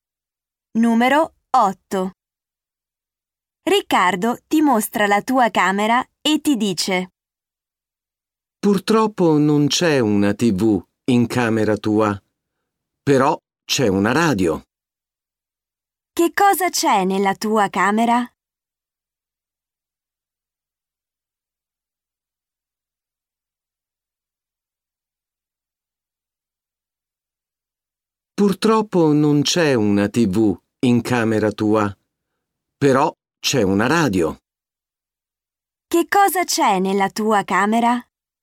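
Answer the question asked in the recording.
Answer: Una radio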